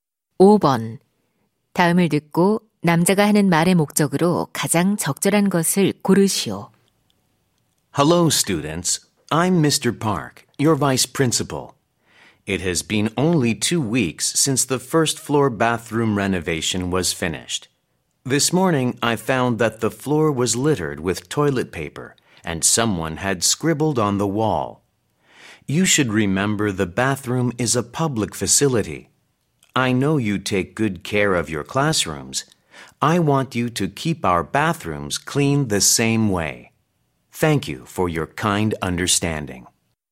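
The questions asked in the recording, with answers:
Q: 다음을 듣고 남자가 하는 말의 목적으로 가장 적절한 것을 고르시오.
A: 학교 화장실을 깨끗하게 사용할 것을 당부하려고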